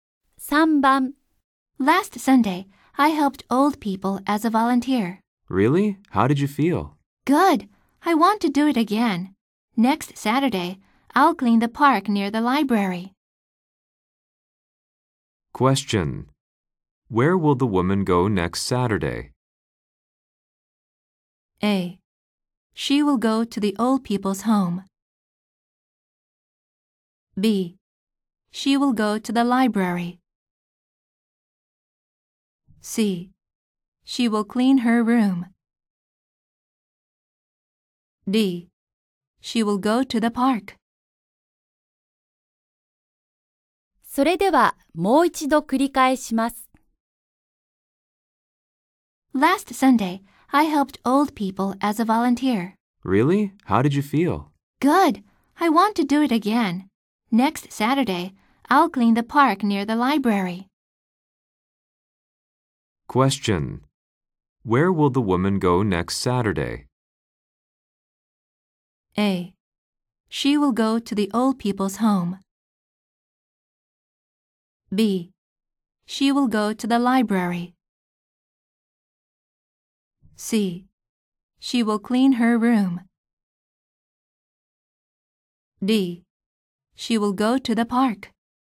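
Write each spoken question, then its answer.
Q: Where will the woman go next Saturday?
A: D: She will go to the park.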